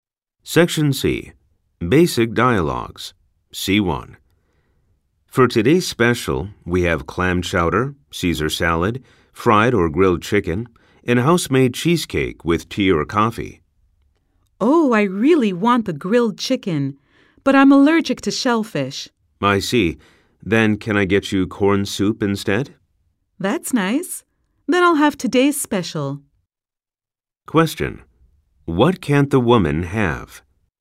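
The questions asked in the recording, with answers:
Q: What can't the woman have?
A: Clam chowder (she is allergic to shellfish)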